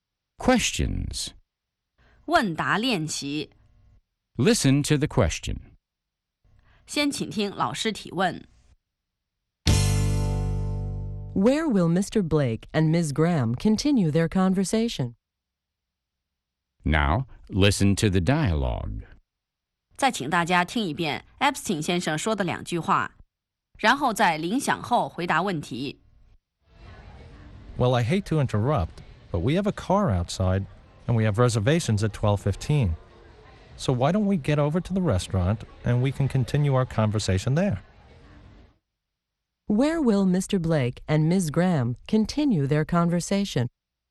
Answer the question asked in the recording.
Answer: They'll continue their conversation at the restaurant.